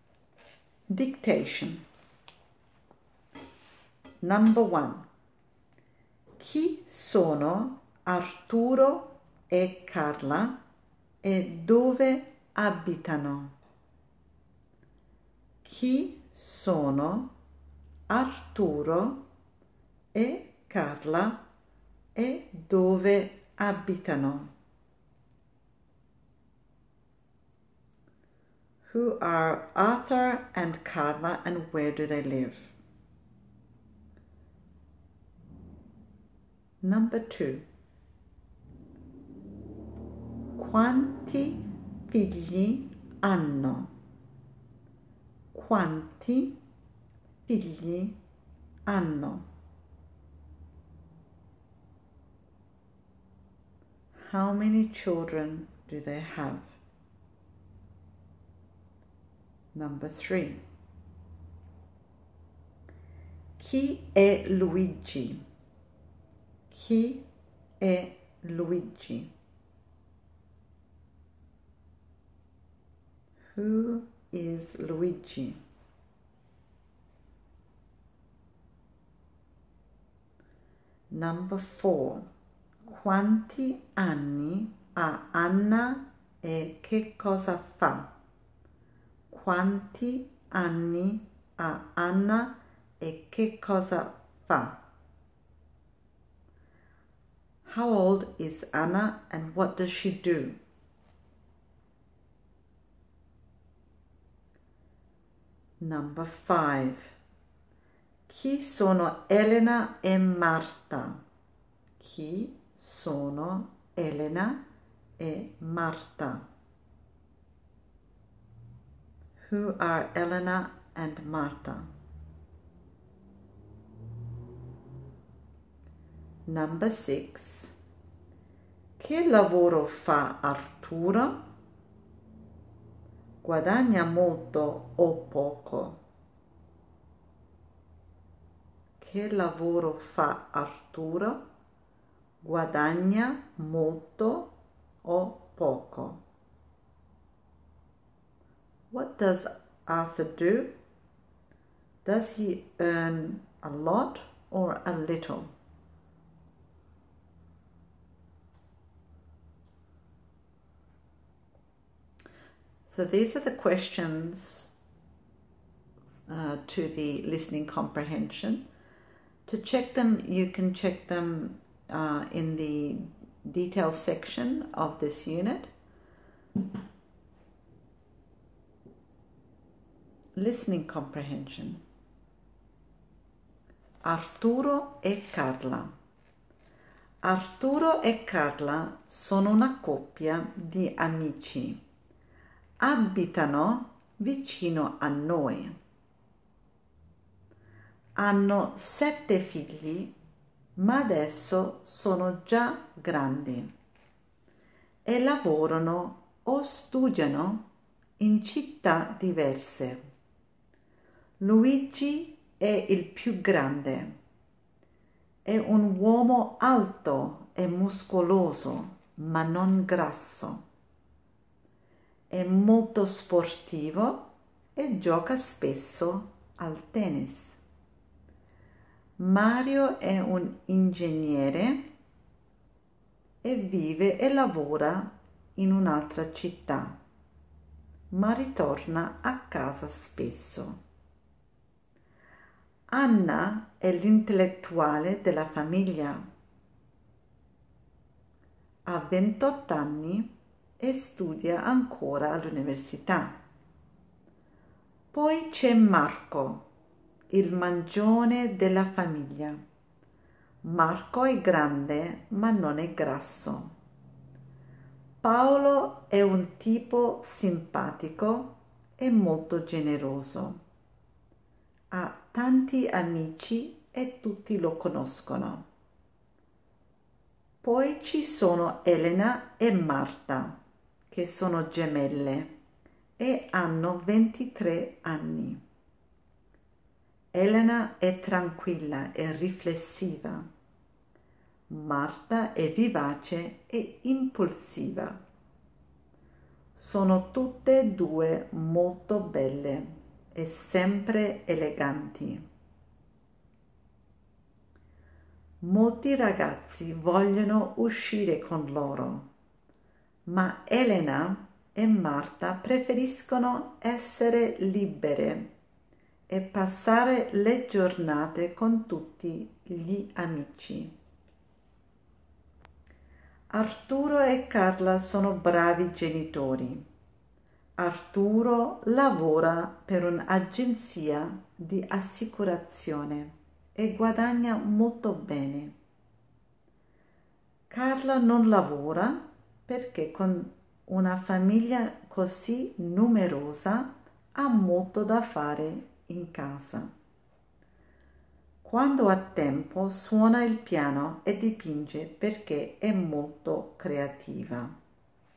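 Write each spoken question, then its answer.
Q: Chi sono Arturo e Carla e dove abitano?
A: Sono una coppia di amici e abitano vicino a noi.

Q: Quanti figli hanno?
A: Sette figli.

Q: Chi è Luigi?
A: Il figlio più grande, alto, muscoloso e sportivo.

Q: Quanti anni ha Anna e che cosa fa?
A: Ha 28 anni e studia all'università.

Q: Chi sono Elena e Marta?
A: Sono gemelle di 23 anni, figlie di Arturo e Carla.

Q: Che lavoro fa Arturo? Guadagna molto o poco?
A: Lavora per un'agenzia di assicurazione e guadagna molto.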